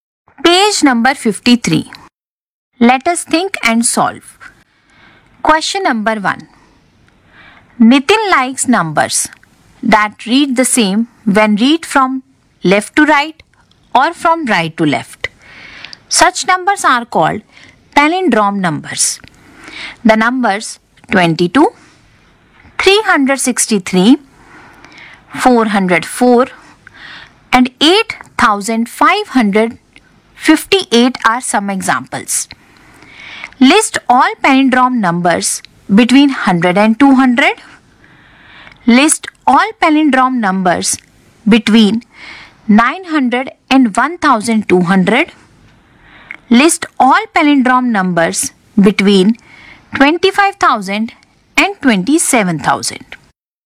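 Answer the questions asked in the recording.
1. 101, 111, 121, 131, 141, 151, 161, 171, 181, 191
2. 909, 919, 929, 939, 949, 959, 969, 979, 989, 999, 1001, 1111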